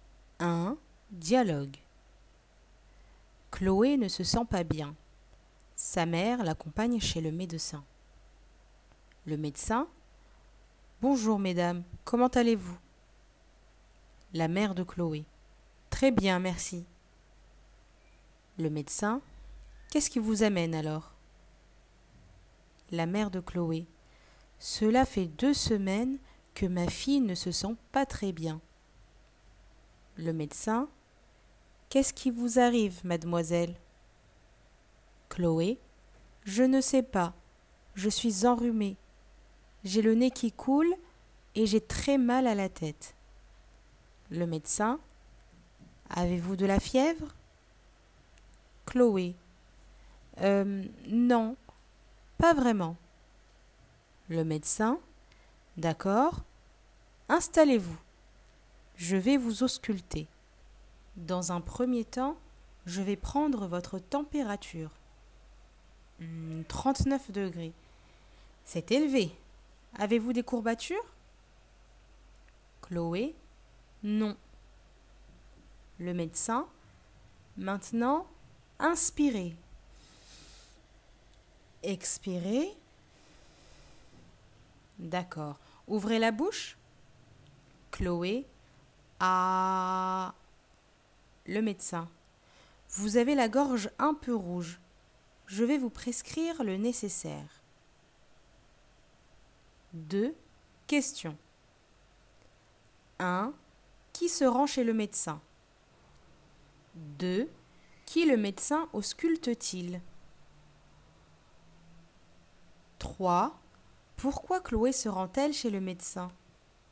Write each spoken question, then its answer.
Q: Qui se rend chez le médecin?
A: Chloé et sa mère.

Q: Qui le médecin ausculte-t-il?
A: Chloé.

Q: Pourquoi Chloé se rend-elle chez le médecin?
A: Car elle ne se sent pas bien.